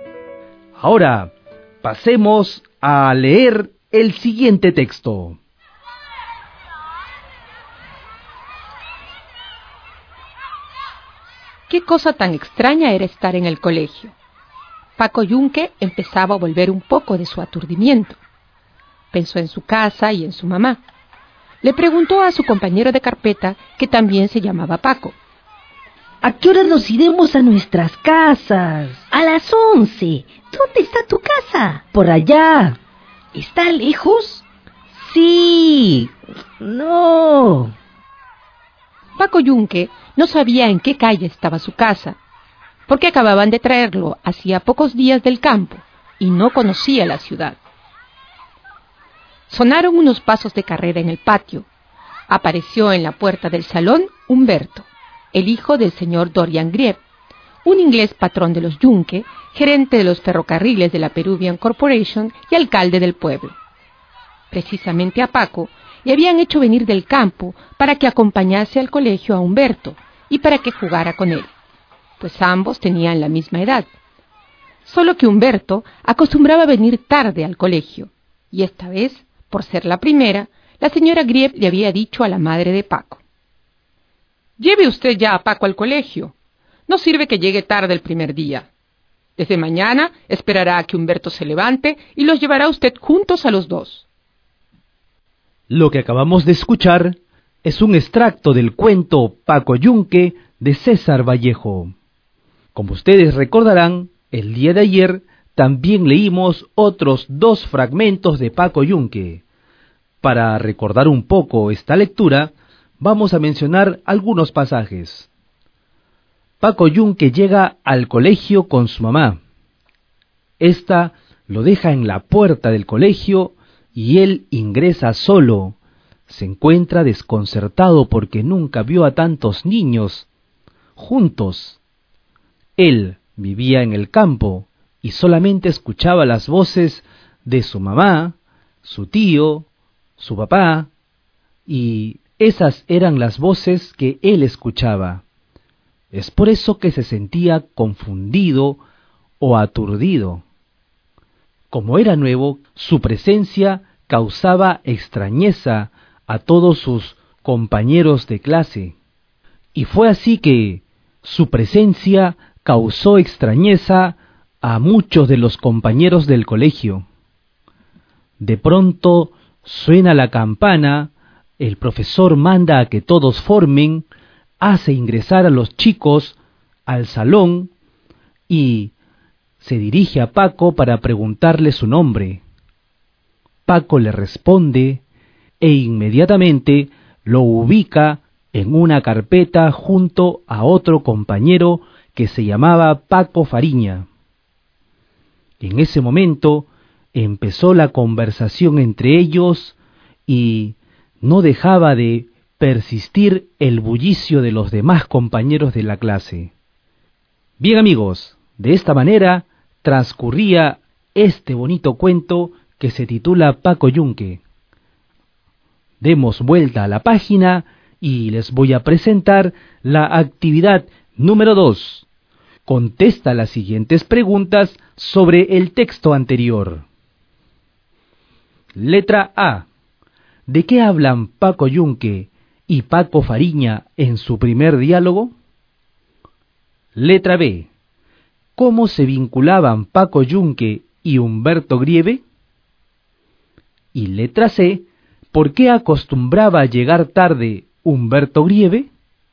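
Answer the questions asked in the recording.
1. De a qué hora se irán a sus casas y dónde está la casa de Paco Yunque
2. Paco acompañaba a Humberto al colegio y jugaba con él; el padre de Humberto era patrón de los Yunque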